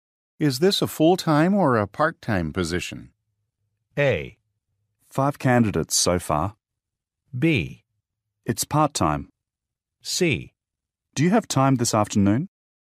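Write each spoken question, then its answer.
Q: Is this a full-time or a part-time position?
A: B: It's part-time.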